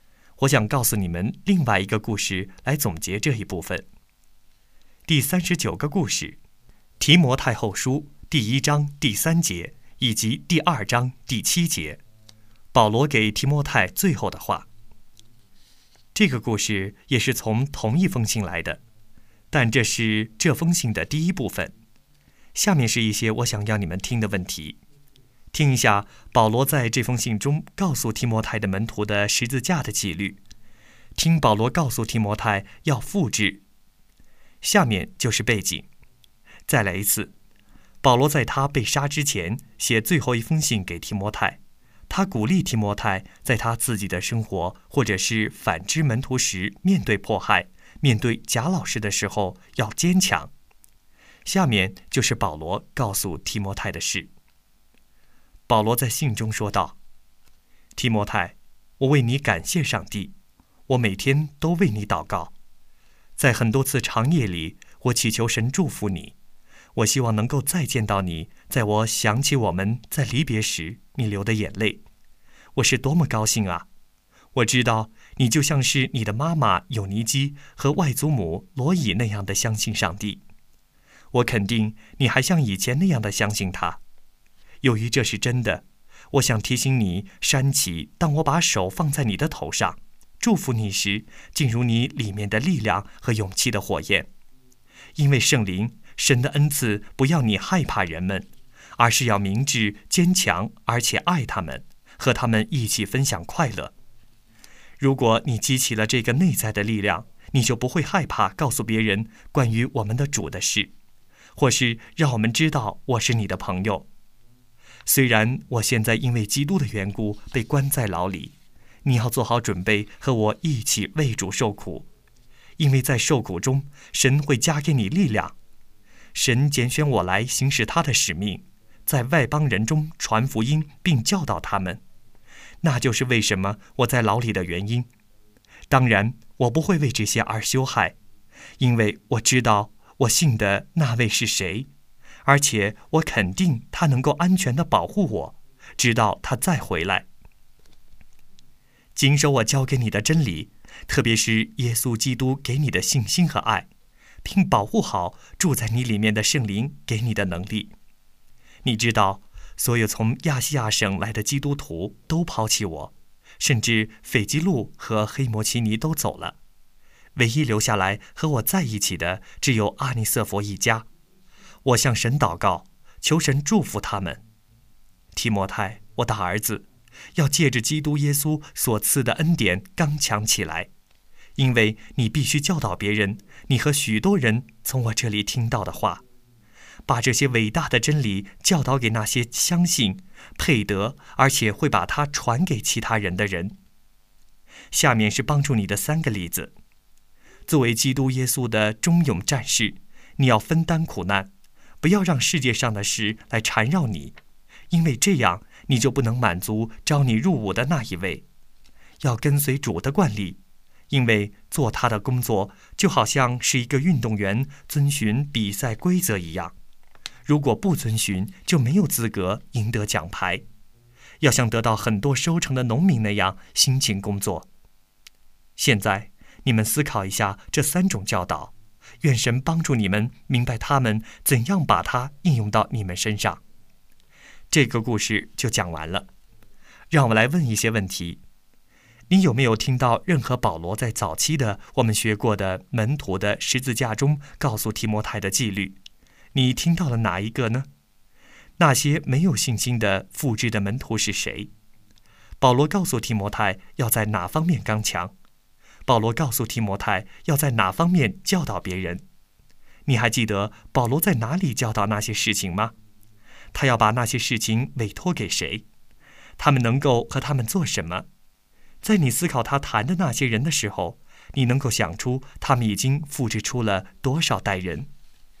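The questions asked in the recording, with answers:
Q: 保罗告诉提摩太要在哪方面刚强?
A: 要借着基督耶稣所赐的恩典刚强起来

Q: 他要把那些事情委托给谁?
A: 那些相信配得而且会把它传给其他人的人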